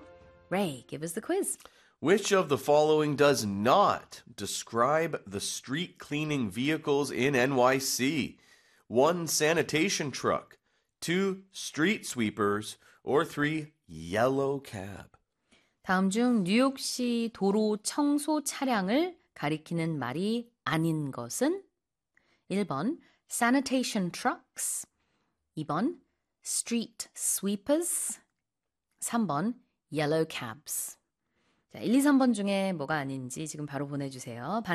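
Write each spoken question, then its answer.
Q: Which of the following does not describe the street cleaning vehicles in NYC?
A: 3: yellow cab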